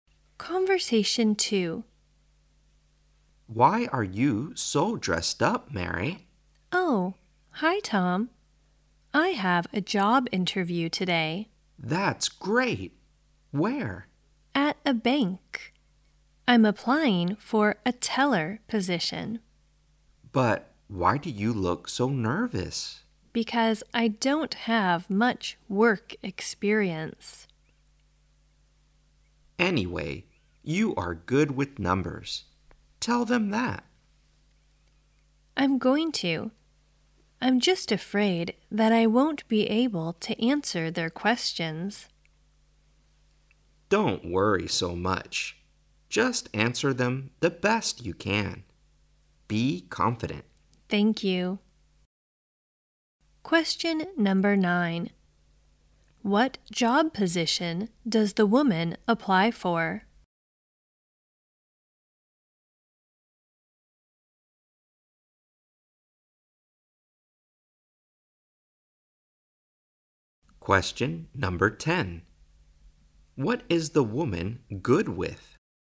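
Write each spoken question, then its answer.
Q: What job position does the woman apply for?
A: A bank teller

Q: What is the woman good with?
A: Numbers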